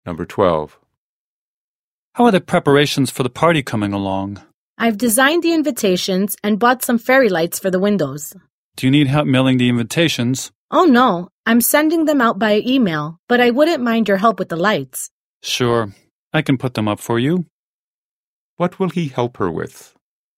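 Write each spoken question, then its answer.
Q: What will he help her with?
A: Putting up the fairy lights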